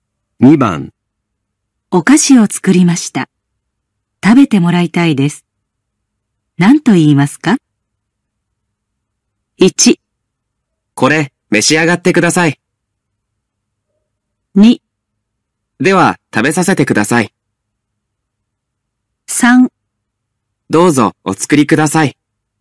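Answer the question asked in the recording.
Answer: 1: これ召し上がってください。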